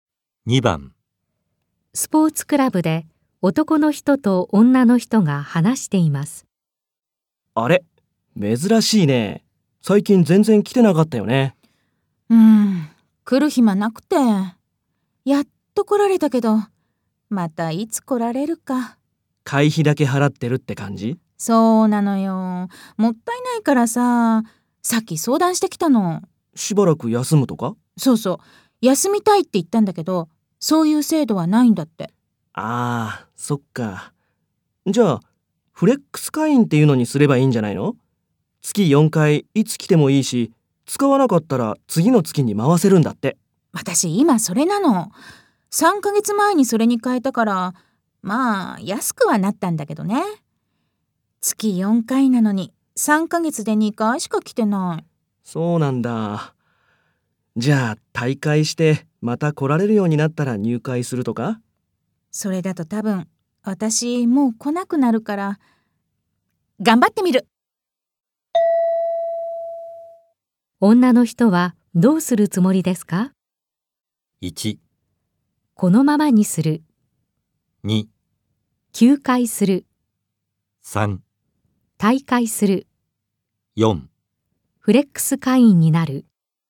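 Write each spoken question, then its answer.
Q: 女の人はどうするつもりですか?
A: 1: このままにする。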